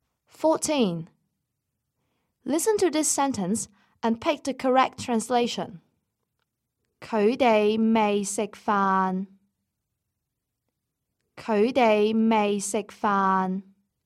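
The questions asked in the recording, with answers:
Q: Listen to this sentence and pick the correct translation.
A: They haven't eaten yet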